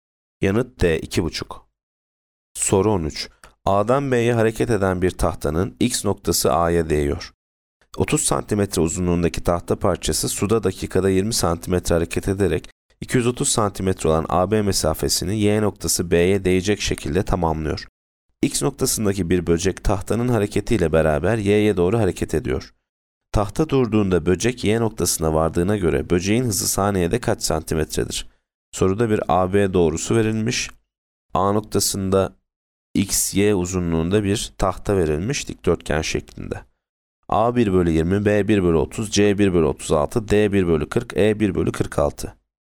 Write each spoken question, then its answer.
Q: Tahta durduğunda böcek Y noktasına vardığına göre böceğin hızı saniyede kaç santimetredir?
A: Yanıt A 1 bölü 20.